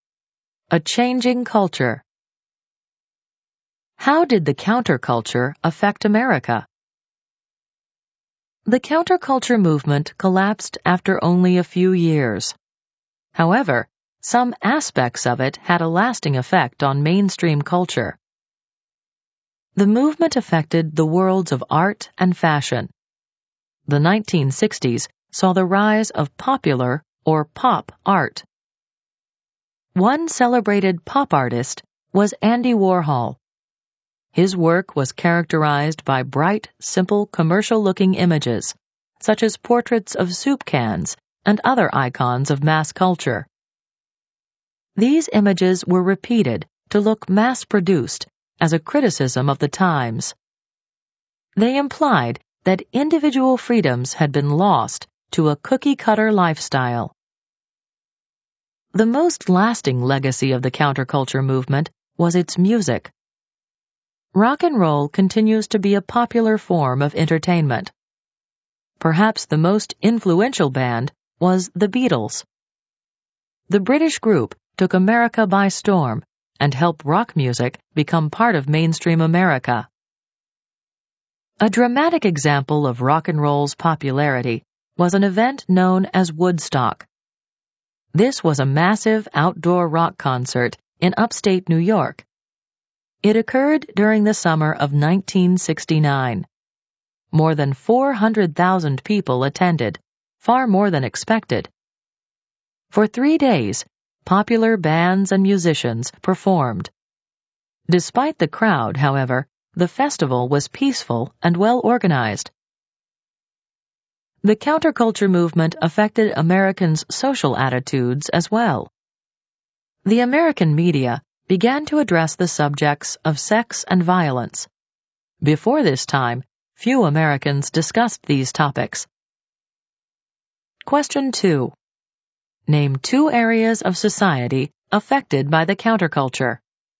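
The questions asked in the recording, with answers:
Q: Name two areas of society affected by the counterculture.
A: Art and fashion, music, social attitudes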